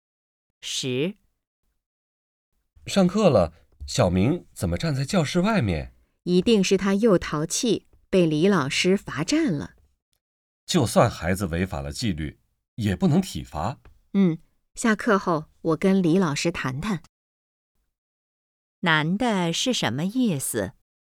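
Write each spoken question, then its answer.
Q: 男的是什么意思?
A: 不能体罚孩子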